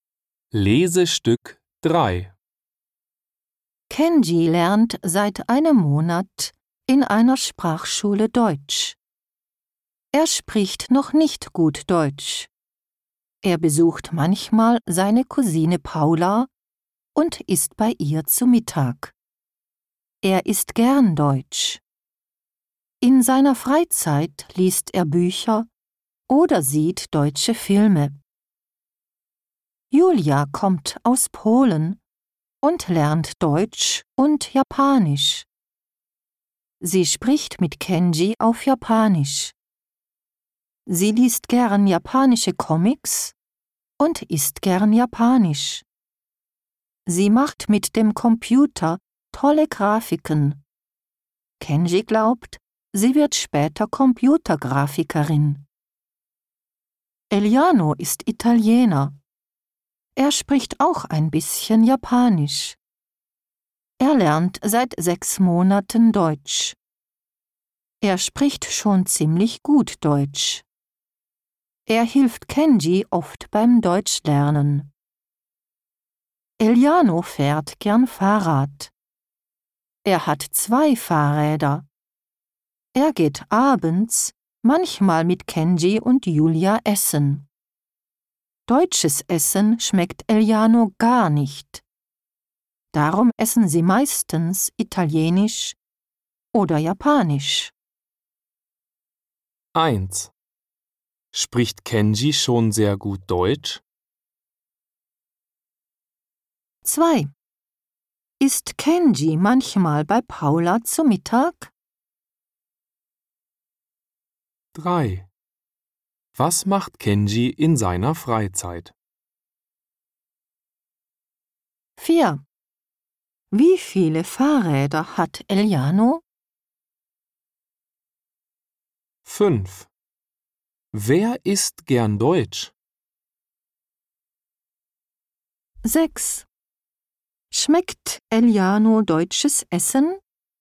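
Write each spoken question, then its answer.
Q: Spricht Kenji schon sehr gut Deutsch?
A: Nein, er spricht noch nicht gut Deutsch.

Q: Ist Kenji manchmal bei Paula zu Mittag?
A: Ja, er isst manchmal bei Paula zu Mittag.

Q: Was macht Kenji in seiner Freizeit?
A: Er liest Bücher oder sieht deutsche Filme.

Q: Wie viele Fahrräder hat Eliano?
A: Zwei.

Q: Wer isst gern Deutsch?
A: Kenji.

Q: Schmeckt Eliano deutsches Essen?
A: Nein, gar nicht.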